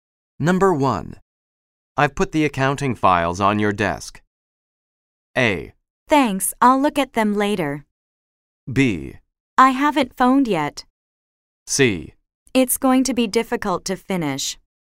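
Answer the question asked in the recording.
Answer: A: Thanks, I'll look at them later.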